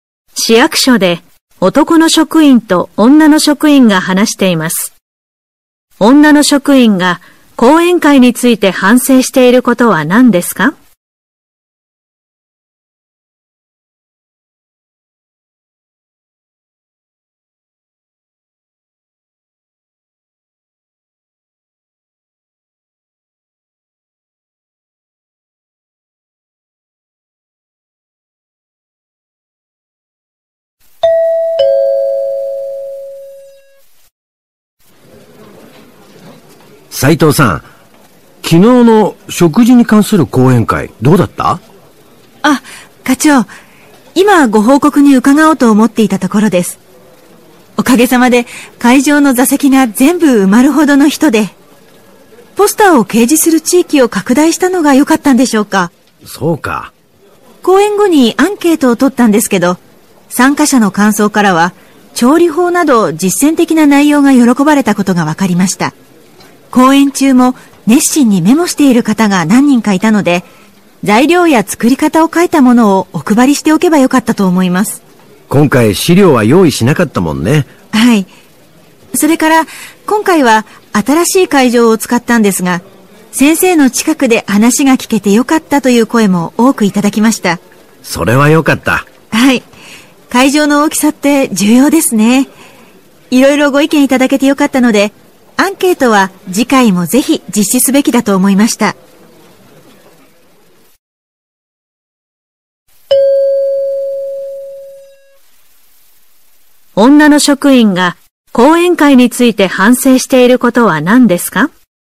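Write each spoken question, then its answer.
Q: 女の職員が講演会について反省していることは何ですか?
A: 材料や作り方を書いた資料を配らなかったこと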